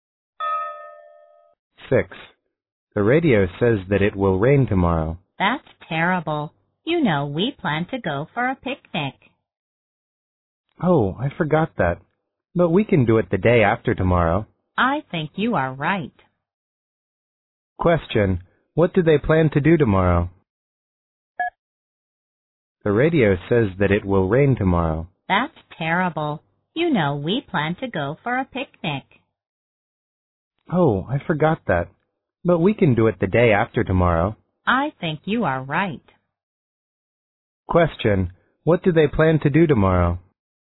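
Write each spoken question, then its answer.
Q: what do they plan to do tomorrow?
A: Go for a picnic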